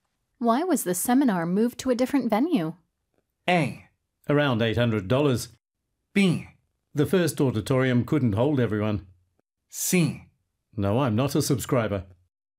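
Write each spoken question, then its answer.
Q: Why was the seminar moved to a different venue?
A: B: The first auditorium couldn't hold everyone.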